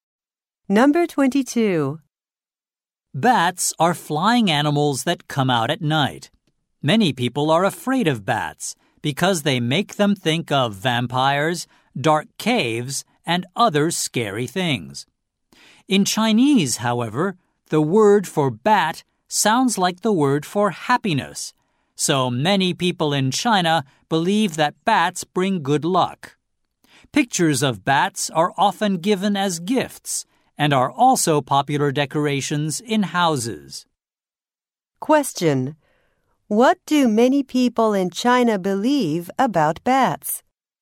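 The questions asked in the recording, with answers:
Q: What do many people in China believe about bats?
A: They bring good luck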